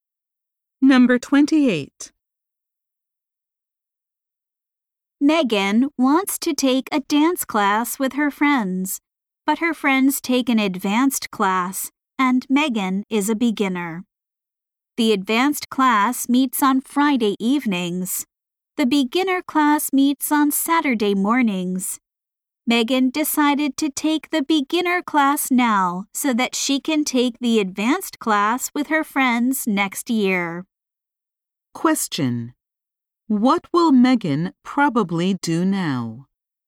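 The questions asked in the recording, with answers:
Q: What will Megan probably do now?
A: Take the beginner class on Saturday mornings.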